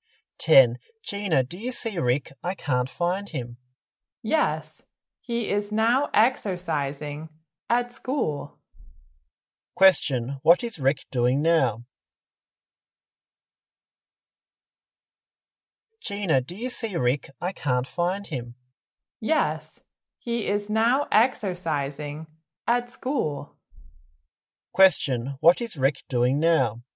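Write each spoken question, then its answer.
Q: what is Rick doing now?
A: Exercising at school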